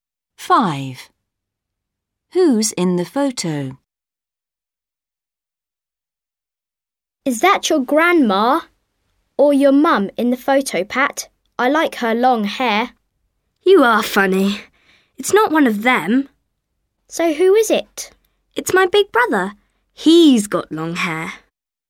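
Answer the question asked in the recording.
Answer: Pat's big brother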